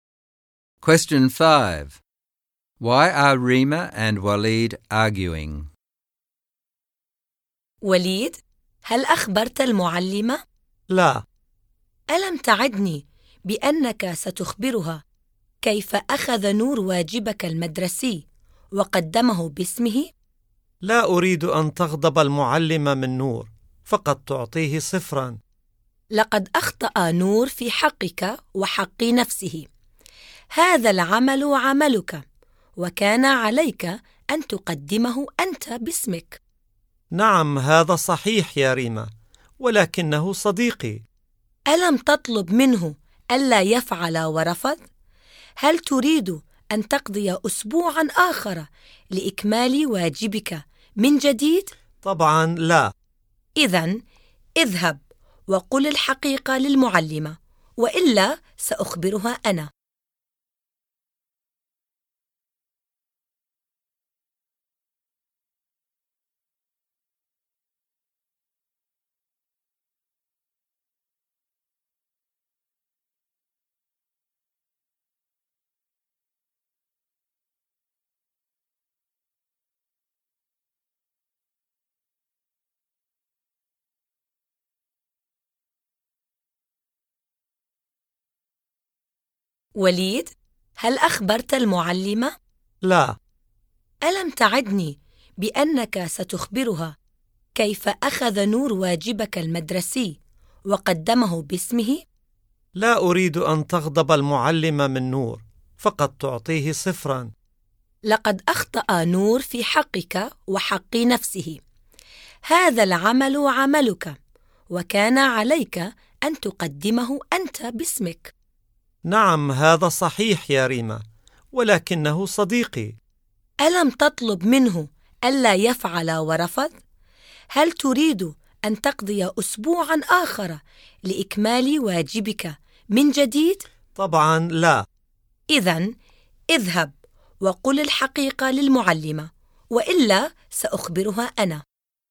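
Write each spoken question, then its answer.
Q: Why are Rima and Waleed arguing?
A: Rima wants Waleed to tell the teacher that Nour handed in Waleed's homework under his own name, but Waleed won't because Nour is his friend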